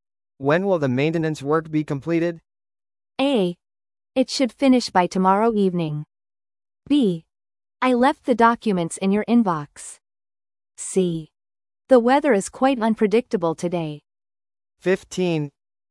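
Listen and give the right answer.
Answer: A: It should finish by tomorrow evening.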